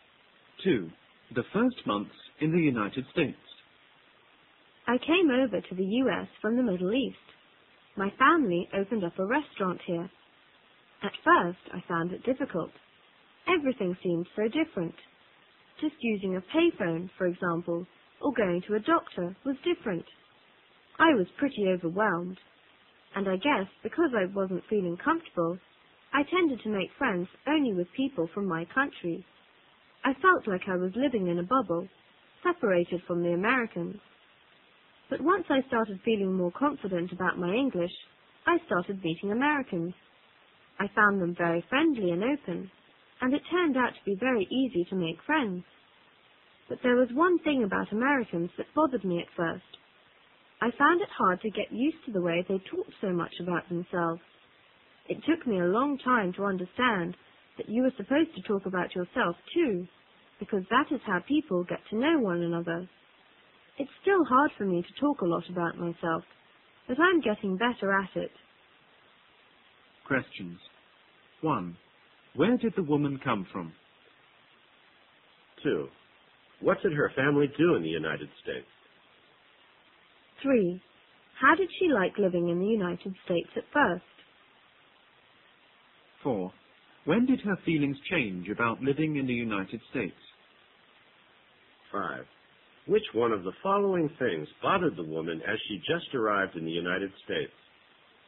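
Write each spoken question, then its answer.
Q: Where did the woman come from?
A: The Middle East

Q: What did her family do in the United States?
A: They opened a restaurant

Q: How did she like living in the United States at first?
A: She found it difficult and felt overwhelmed

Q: When did her feelings change about living in the United States?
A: When she started feeling more confident about her English

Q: Which one of the following things bothered the woman as she just arrived in the United States?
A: Americans talking so much about themselves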